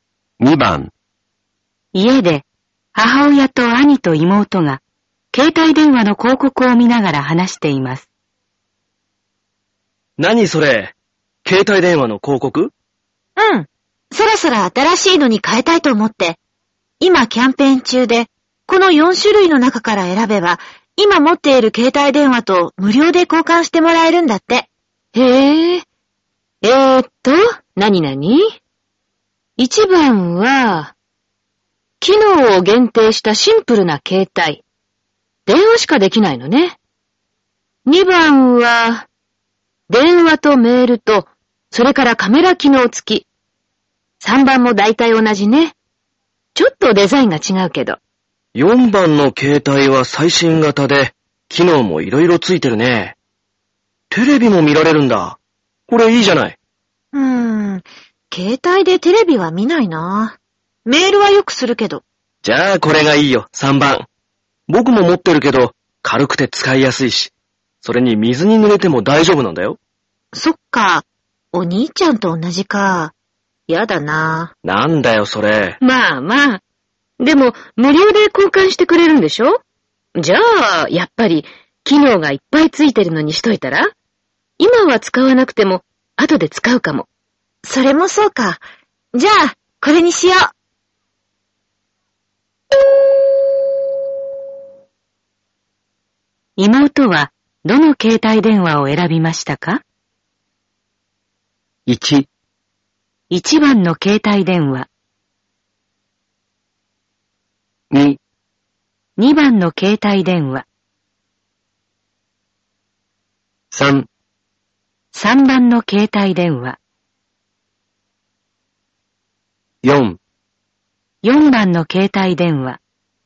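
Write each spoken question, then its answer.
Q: 妹は、どの携帯電話を選びましたか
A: 4: 4番の携帯電話。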